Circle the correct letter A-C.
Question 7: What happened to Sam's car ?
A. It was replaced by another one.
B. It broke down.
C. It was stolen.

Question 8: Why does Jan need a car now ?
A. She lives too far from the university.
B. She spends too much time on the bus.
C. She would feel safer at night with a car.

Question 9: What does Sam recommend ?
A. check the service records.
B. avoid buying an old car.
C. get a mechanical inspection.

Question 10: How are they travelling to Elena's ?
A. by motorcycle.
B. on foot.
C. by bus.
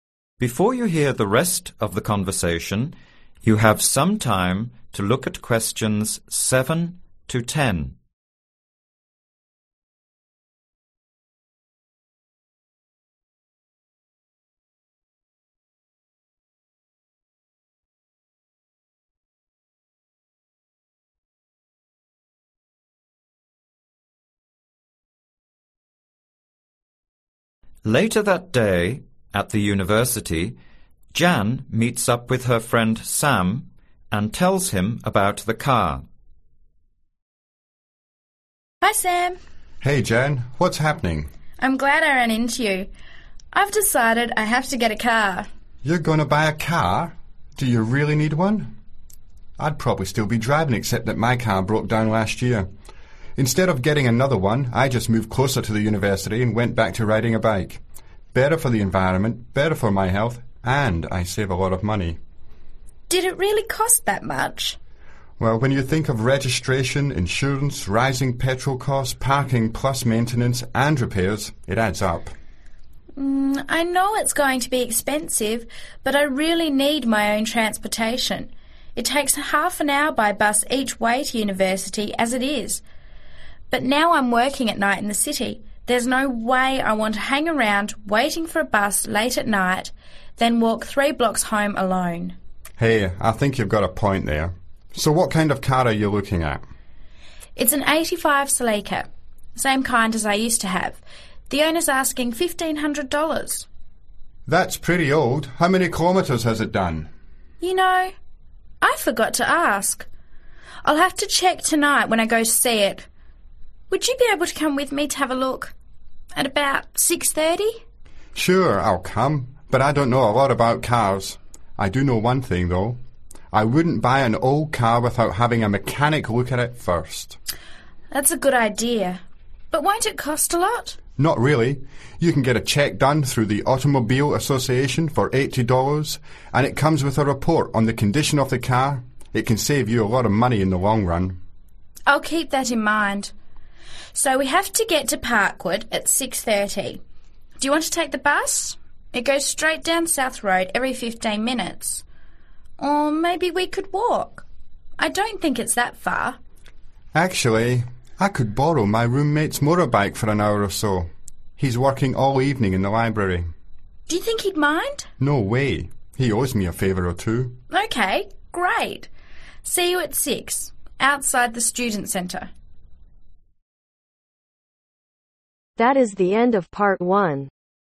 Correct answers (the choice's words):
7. It broke down.
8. She would feel safer at night with a car.
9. get a mechanical inspection.
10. by motorcycle.